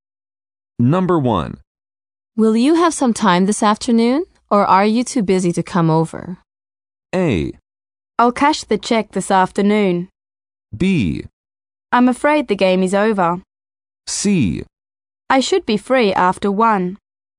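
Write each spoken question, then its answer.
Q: Will you have some time this afternoon, or are you too busy to come over?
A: C: I should be free after 1.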